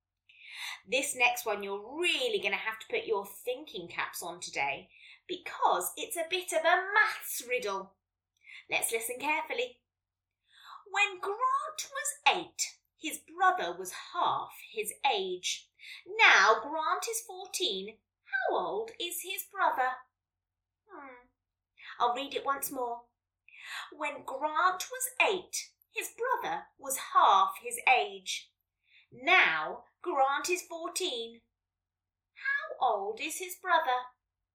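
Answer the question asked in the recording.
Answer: 10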